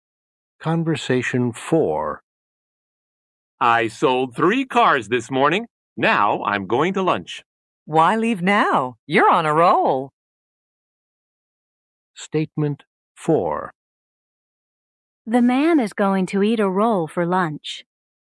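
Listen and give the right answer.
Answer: False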